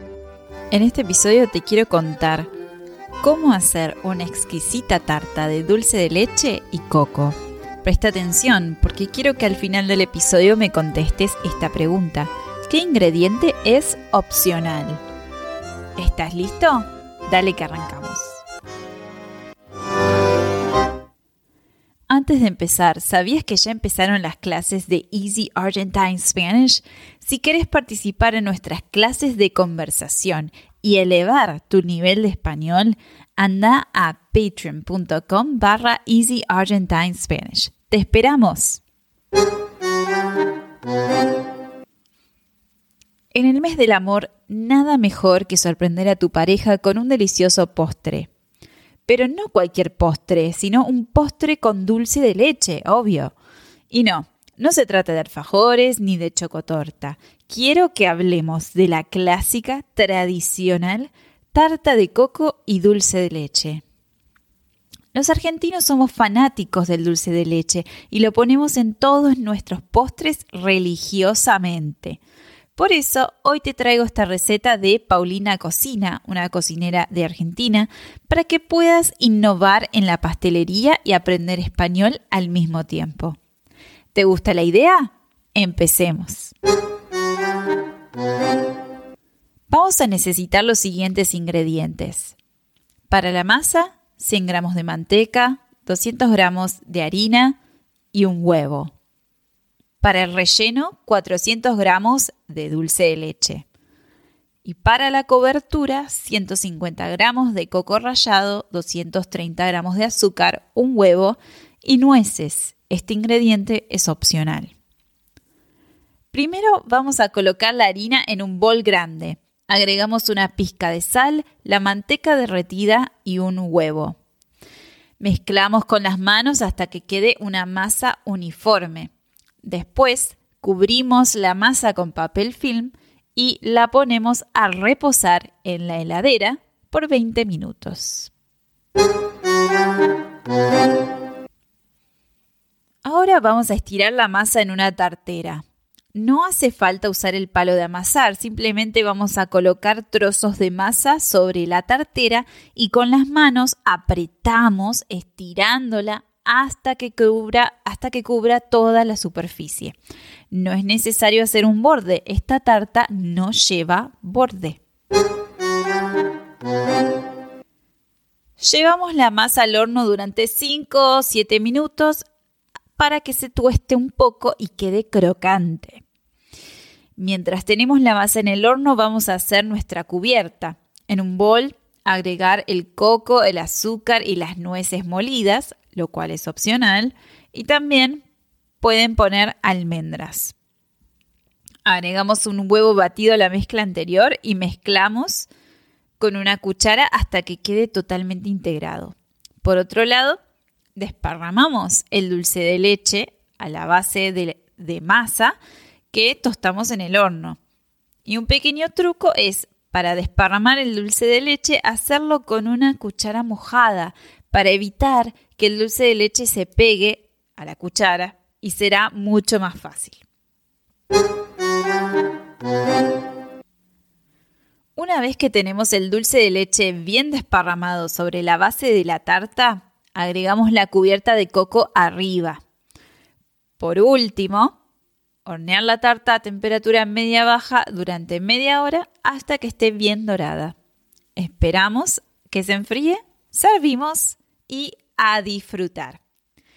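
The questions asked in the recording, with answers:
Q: ¿Qué ingrediente es opcional?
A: Las nueces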